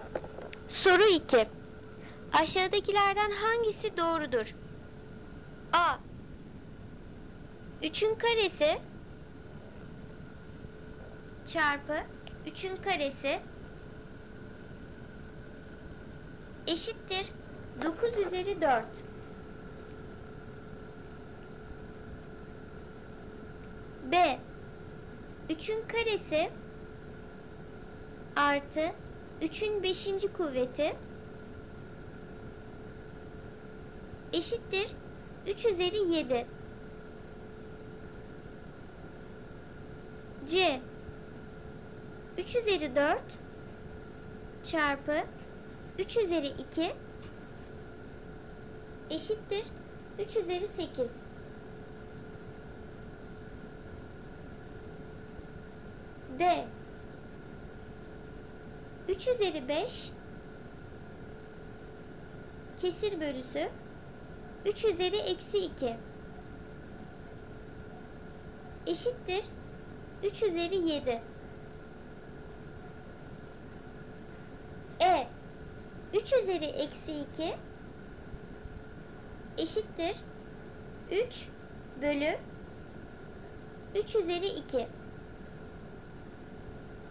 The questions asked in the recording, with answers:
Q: Aşağıdakilerden hangisi doğrudur?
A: Doğru cevap D seçeneği. 3 üzeri 5 bölü 3 üzeri eksi 2 eşittir 3 üzeri 7.